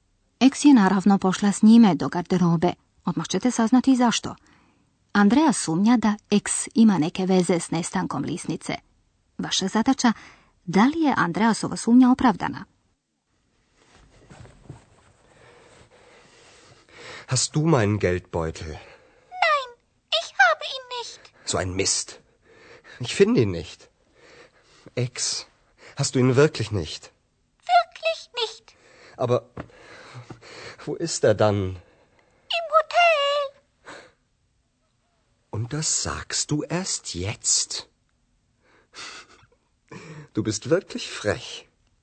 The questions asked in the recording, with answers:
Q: Vaša zadaća, da li je Andreasova sumnja opravdana?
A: Točno je to da eks nema lisnicu.